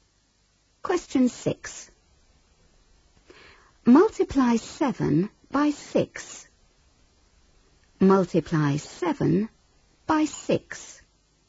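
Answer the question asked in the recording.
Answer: 42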